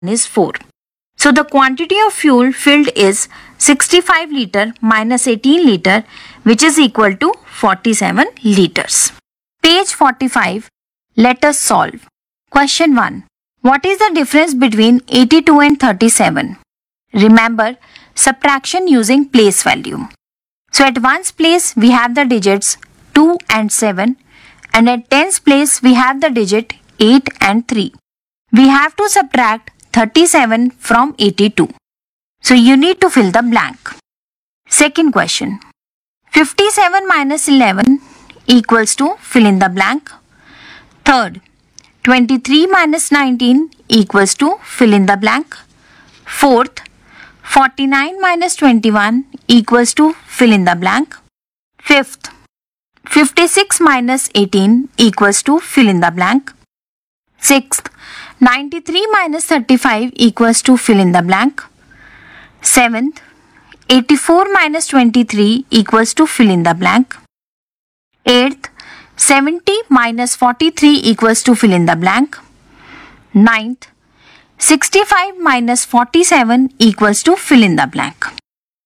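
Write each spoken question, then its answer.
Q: 65 minus 47 equals to fill in the blank.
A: 18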